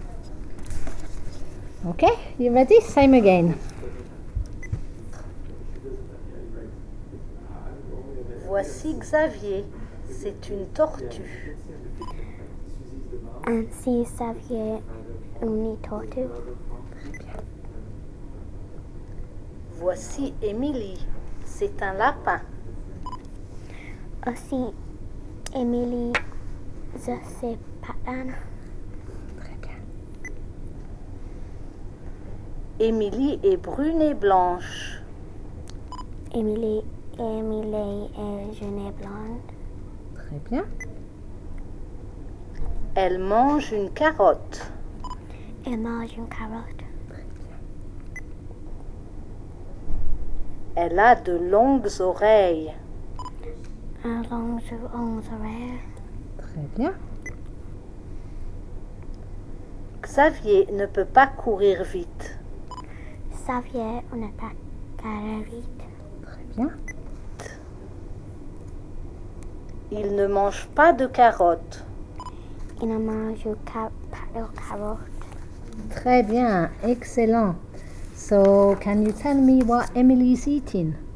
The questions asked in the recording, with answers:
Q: So, can you tell me what Emily is eating?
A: Carottes.